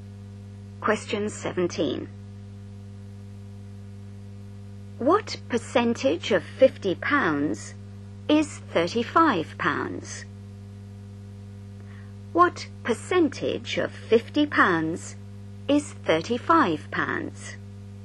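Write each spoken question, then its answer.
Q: What percentage of £50 is £35?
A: 70%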